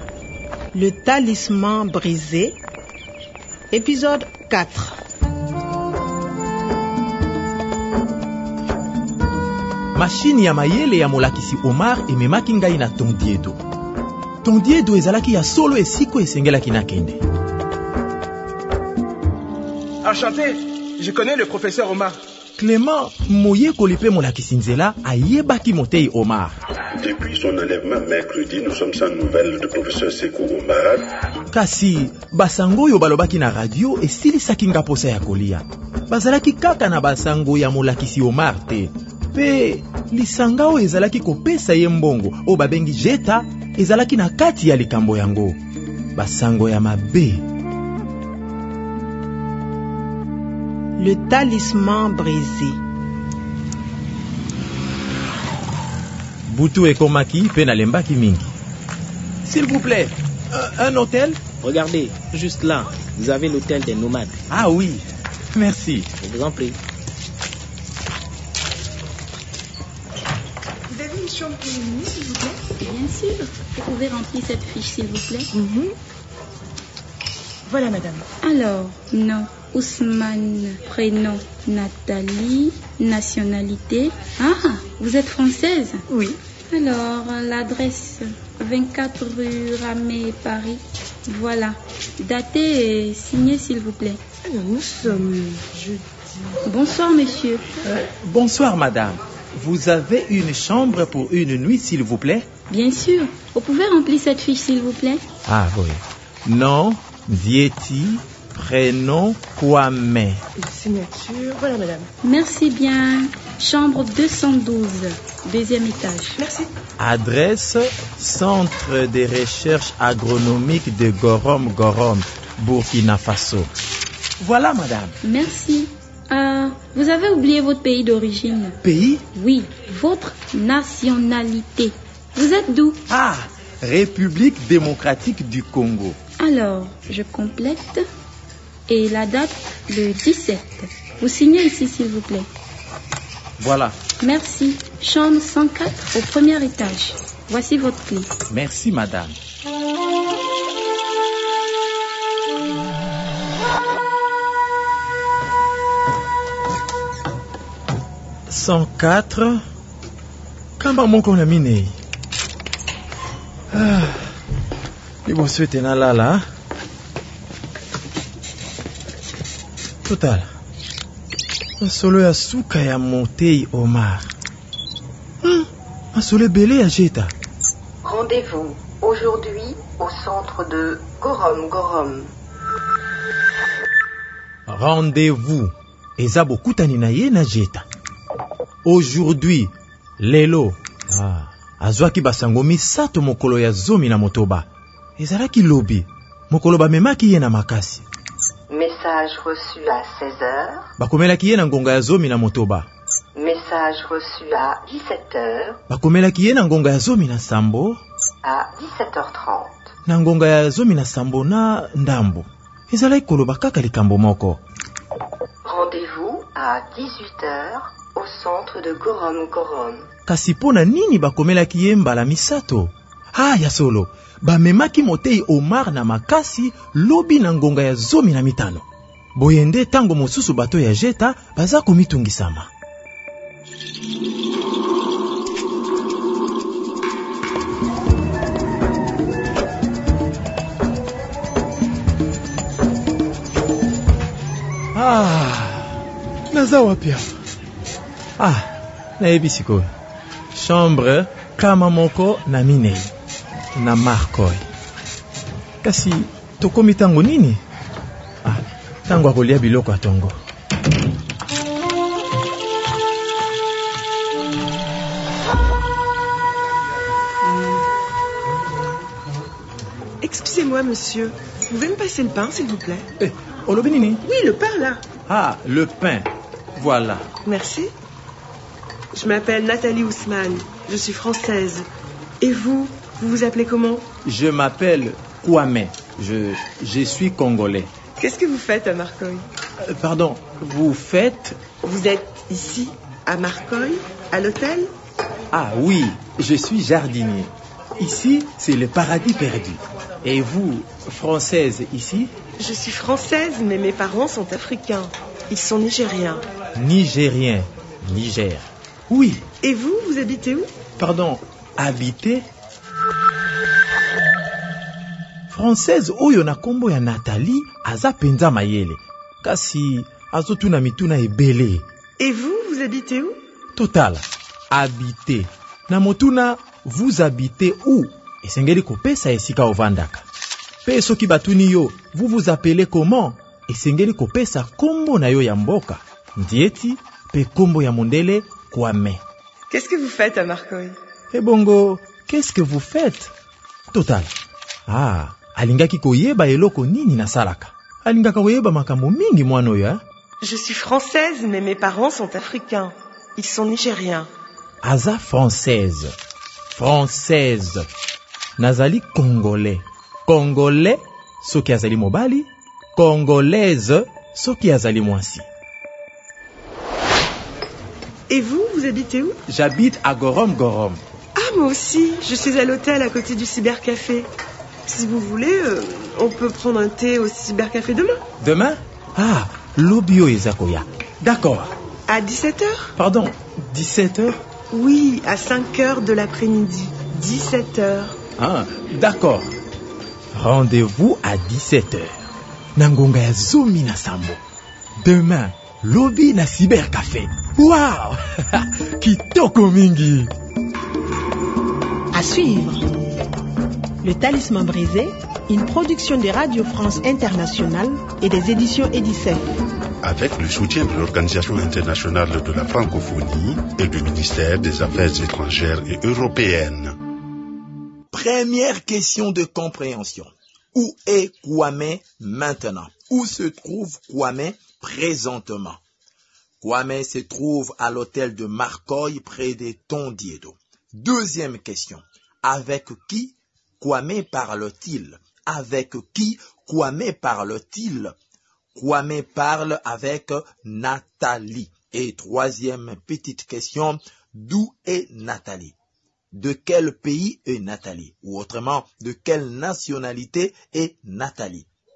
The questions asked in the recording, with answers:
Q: Où est Kwame maintenant? Où se trouve Kwame présentement?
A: Kwame se trouve à l'hôtel de Markoy près des Tondiedo.

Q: d'où est Nathalie? De quel pays est Nathalie? Ou autrement, de quelle nationalité est Nathalie?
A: Nathalie est une Française.